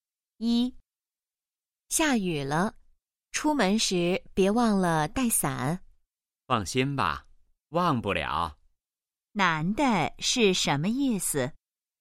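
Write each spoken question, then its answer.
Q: 男的是什么意思?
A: 他不会忘记带伞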